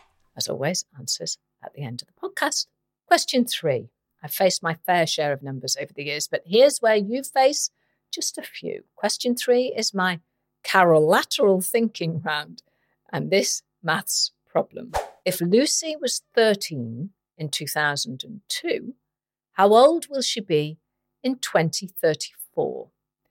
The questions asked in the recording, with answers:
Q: If Lucy was 13 in 2002, how old will she be in 2034?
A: She will be age 45.